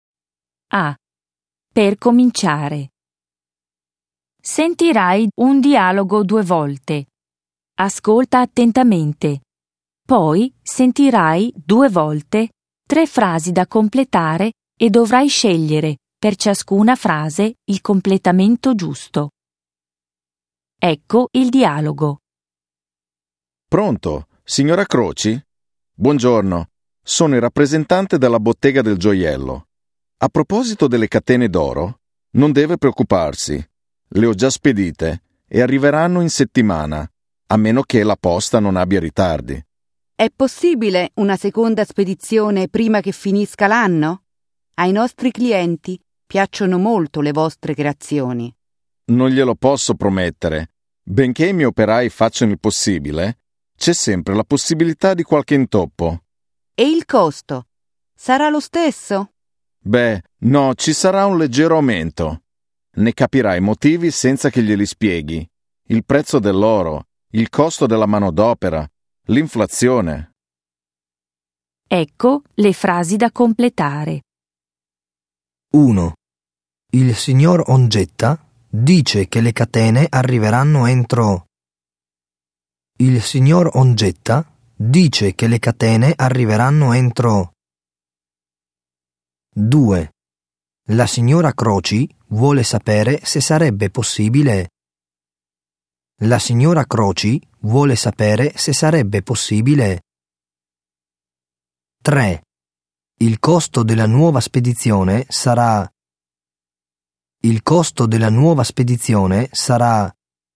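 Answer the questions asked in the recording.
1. la settimana (salvo ritardi della posta)
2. una seconda spedizione prima della fine dell'anno
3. leggermente più alto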